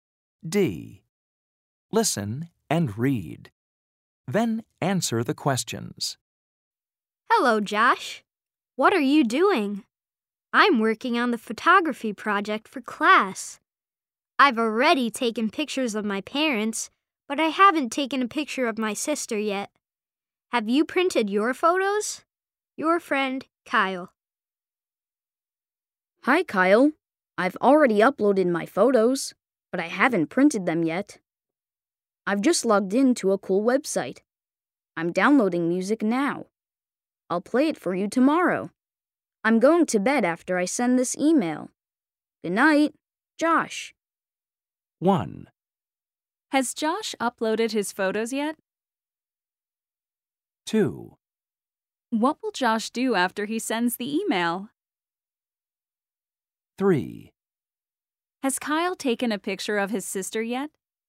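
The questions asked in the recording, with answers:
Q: Has Josh uploaded his photos yet?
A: Yes, he has.

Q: What will Josh do after he sends the email?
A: He's going to go to bed.

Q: Has Kyle taken a picture of his sister yet?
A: No, he hasn't.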